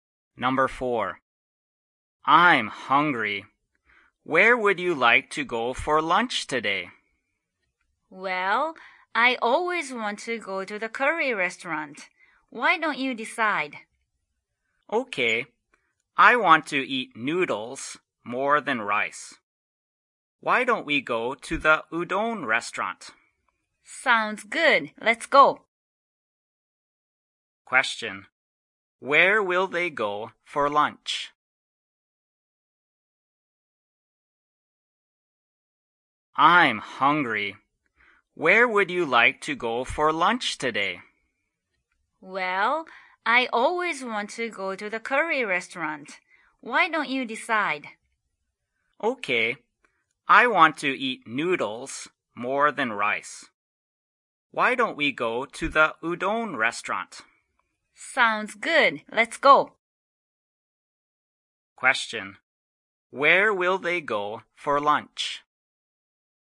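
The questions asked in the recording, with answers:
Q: Where will they go for lunch?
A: The udon restaurant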